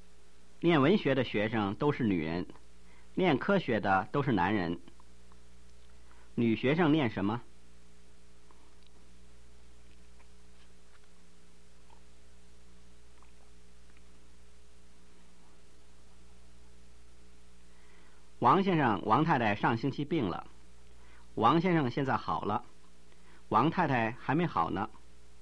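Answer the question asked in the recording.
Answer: 文学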